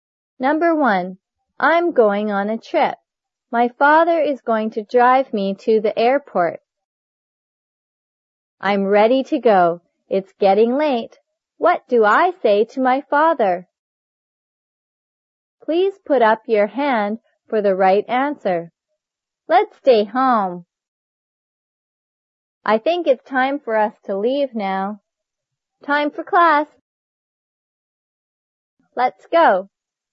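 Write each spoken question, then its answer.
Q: What do I say to my father?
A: I think it's time for us to leave now.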